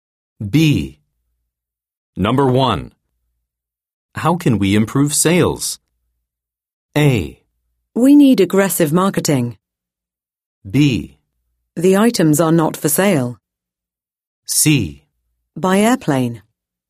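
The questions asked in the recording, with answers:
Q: How can we improve sales?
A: A: We need aggressive marketing.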